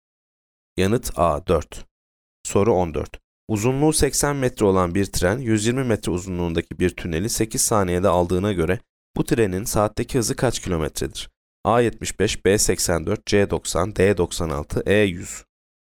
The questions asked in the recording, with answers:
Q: Uzunluğu 80 metre olan bir tren, 120 metre uzunluğundaki bir tüneli 8 saniyede aldığına göre bu trenin saatteki hızı kaç kilometredir?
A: Yanıt C 90.